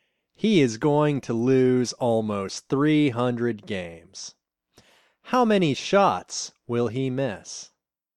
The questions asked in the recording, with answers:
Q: How many shots will he miss?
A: He will miss more than 9,000 shots.